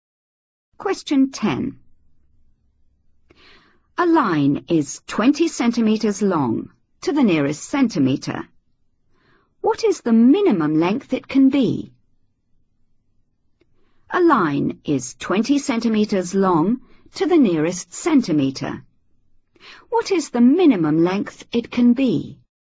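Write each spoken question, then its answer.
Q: What is the minimum length it can be?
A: 19.5 cm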